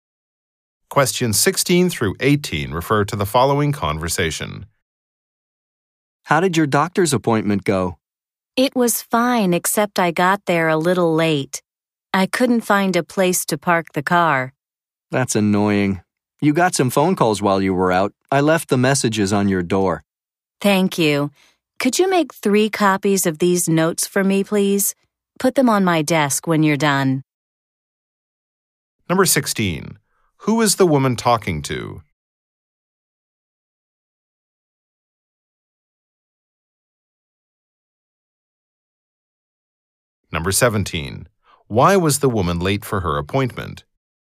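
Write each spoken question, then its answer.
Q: Why was the woman late for her appointment?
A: She couldn't find a place to park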